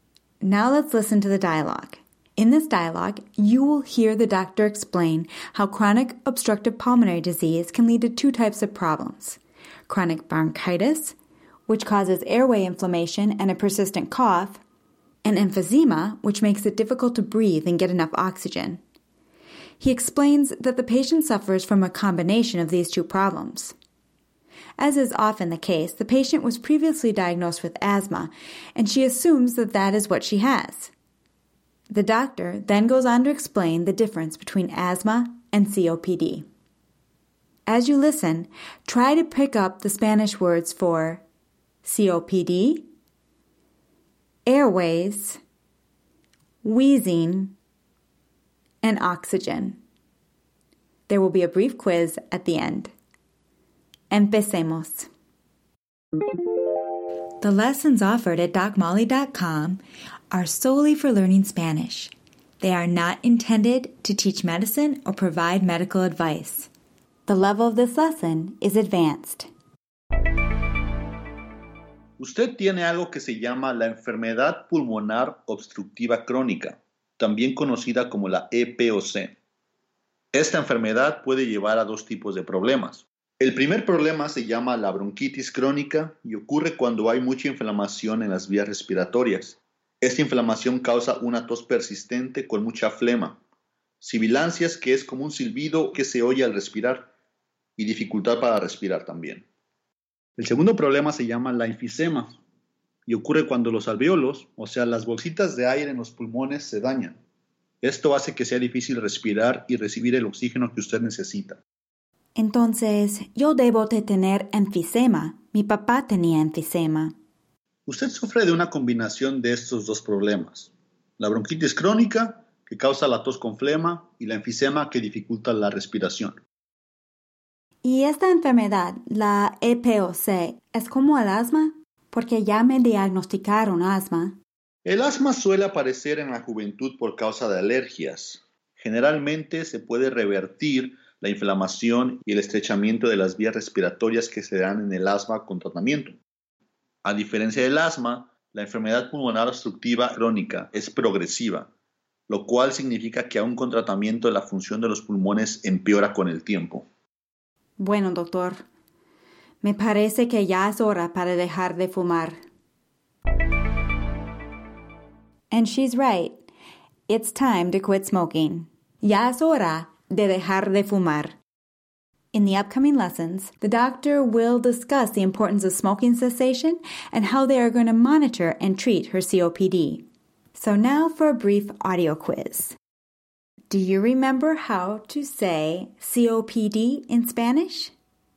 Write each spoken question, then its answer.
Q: Do you remember how to say COPD in Spanish?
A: La EPOC.